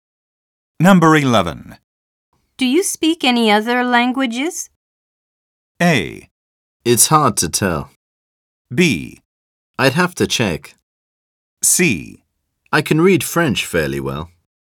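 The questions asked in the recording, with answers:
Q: Do you speak any other languages?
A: C: I can read French fairly well.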